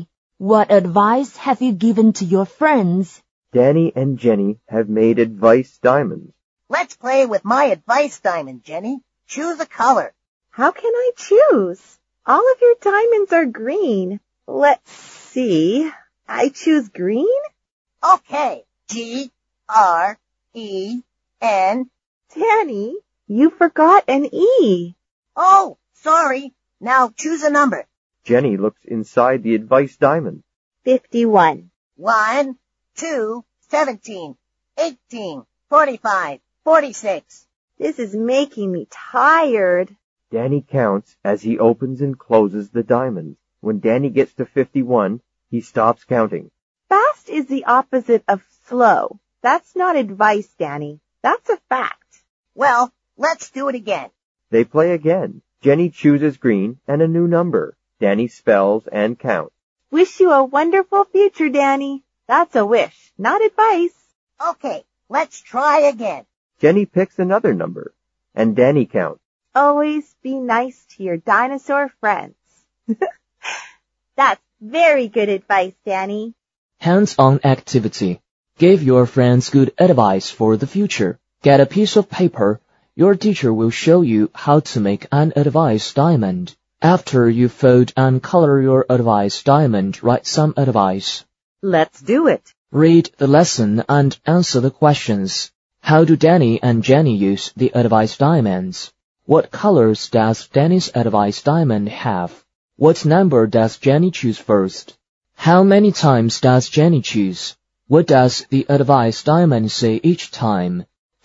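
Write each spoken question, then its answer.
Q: What colors does Danny's advice diamond have?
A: Only green

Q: What number does Jenny choose first?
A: 51

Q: How many times does Jenny choose?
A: Three times

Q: What does the advice diamond say each time?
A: Fast is the opposite of slow; Wish you a wonderful future; Always be nice to your dinosaur friends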